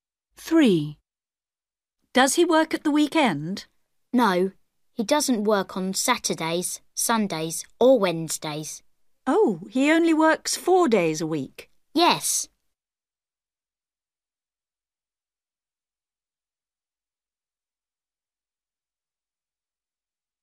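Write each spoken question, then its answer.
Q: Does he work at the weekend?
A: No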